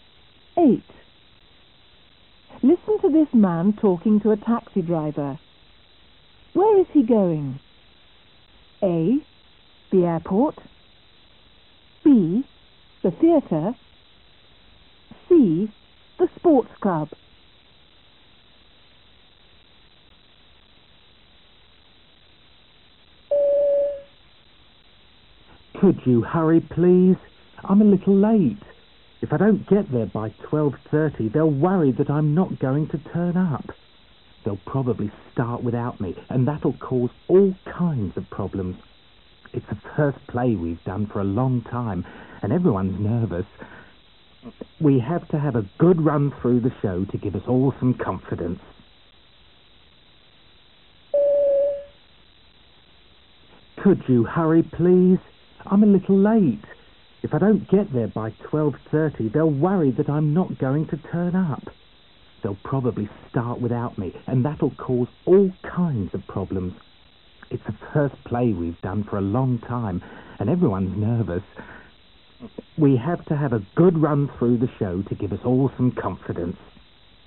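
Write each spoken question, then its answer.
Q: Where is he going?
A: B: The theater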